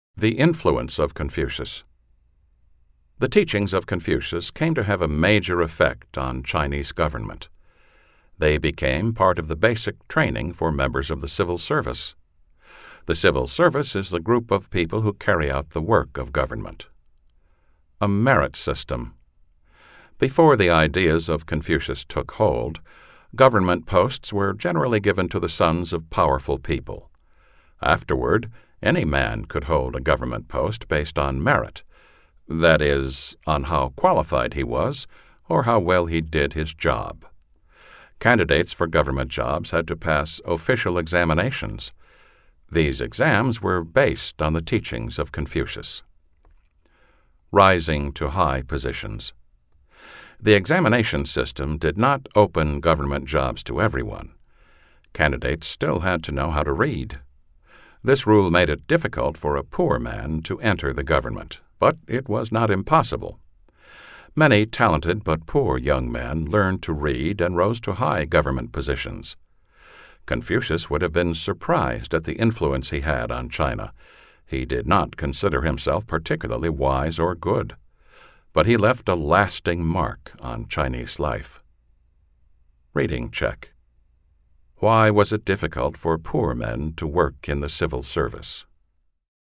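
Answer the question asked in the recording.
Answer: Candidates had to know how to read, and many poor men could not.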